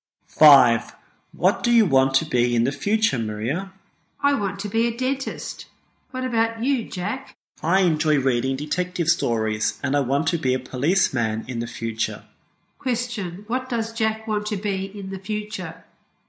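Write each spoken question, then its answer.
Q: What does Jack want to be in the future?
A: A policeman.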